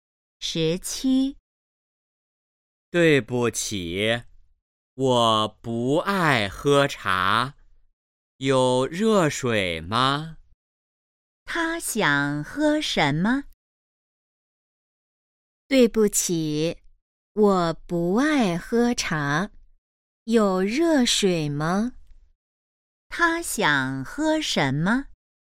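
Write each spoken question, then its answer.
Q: 他想喝什么?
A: 热水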